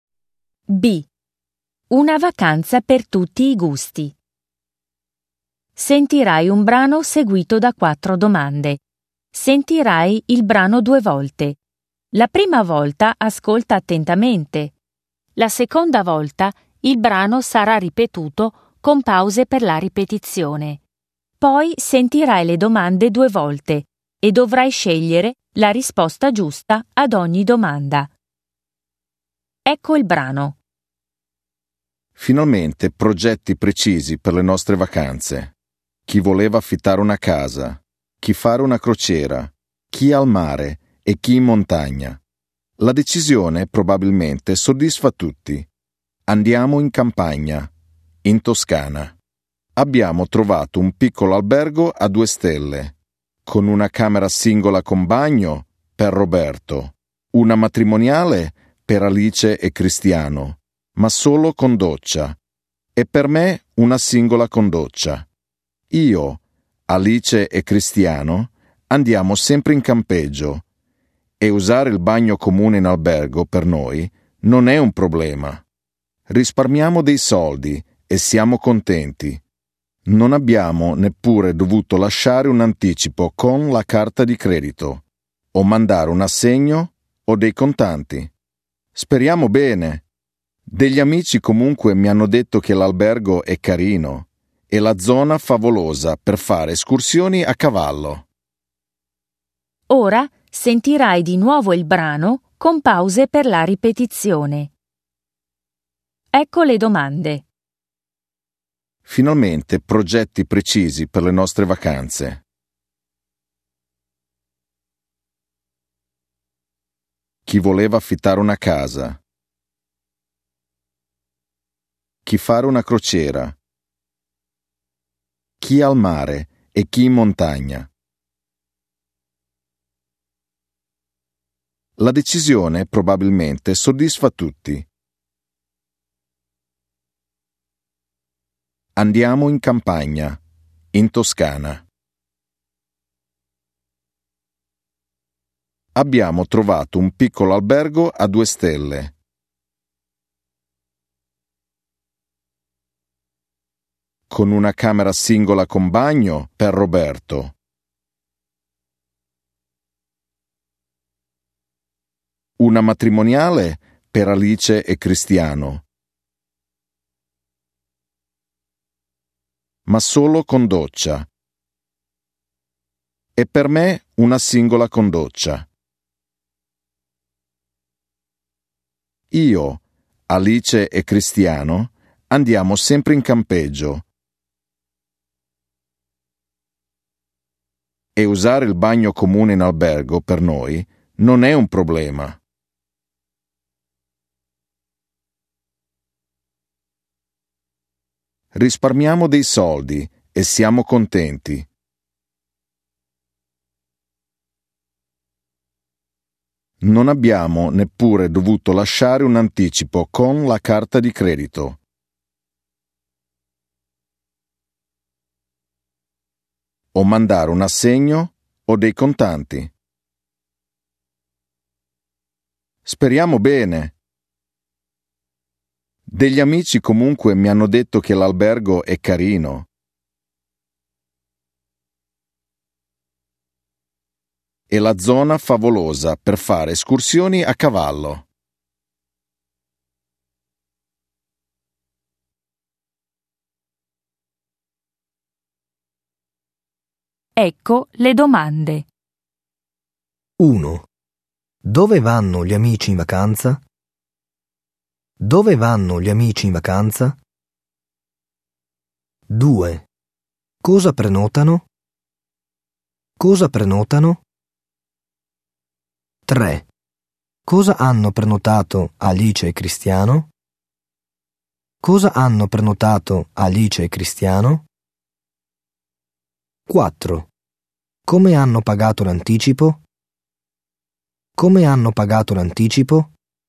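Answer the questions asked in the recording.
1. In campagna, in Toscana
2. Camere in un piccolo albergo a 2 stelle
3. Una camera matrimoniale con doccia
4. Non hanno pagato nessun anticipo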